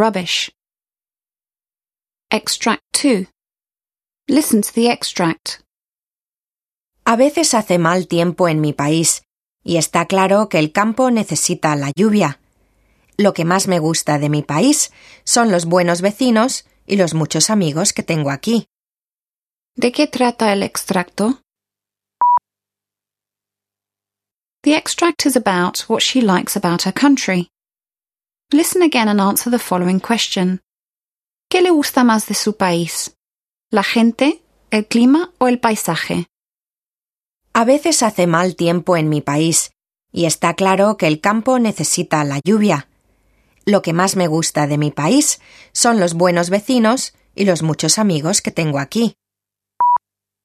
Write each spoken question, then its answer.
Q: ¿De qué trata el extracto?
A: extract is about what she likes about her country.

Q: ¿Qué le gusta más de su país?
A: The answer is, most of all, she likes the people.